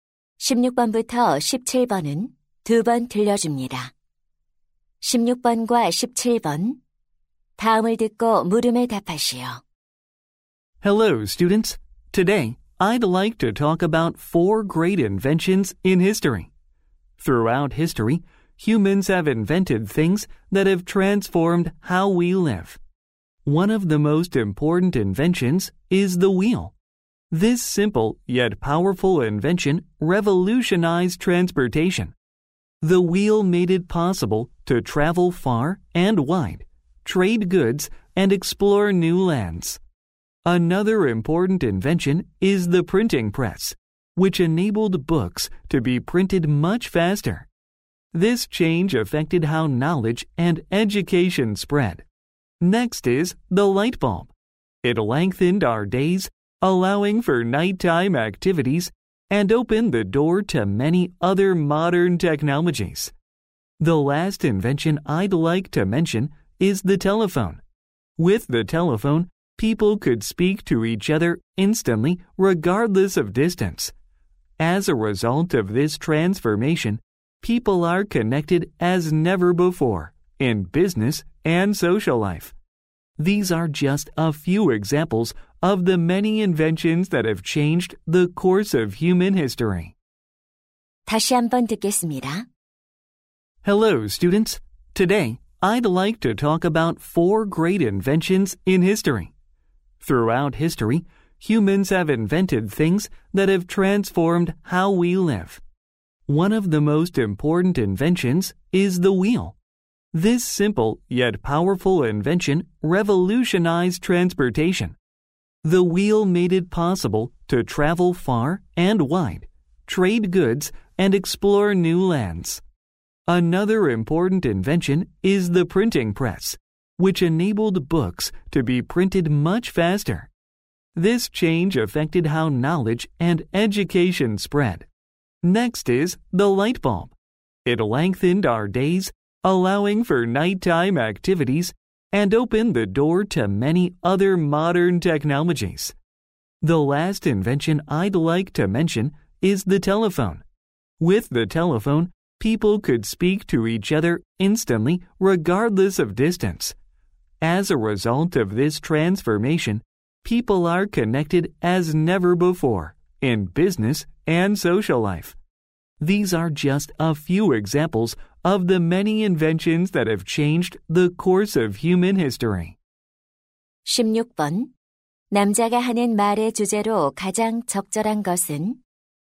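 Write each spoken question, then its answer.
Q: 남자가 하는 말의 주제로 가장 적절한 것은?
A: 인류의 삶을 바꾼 위대한 발명품들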